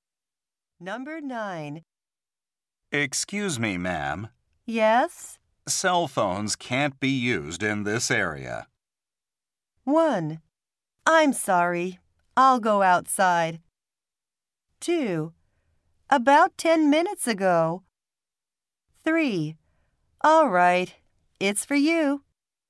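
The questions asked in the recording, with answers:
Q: Cell phones can't be used in this area.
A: 1: I'm sorry. I'll go outside.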